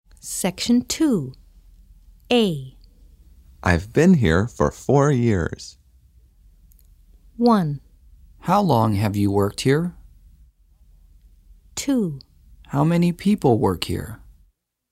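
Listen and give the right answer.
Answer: 1: How long have you worked here?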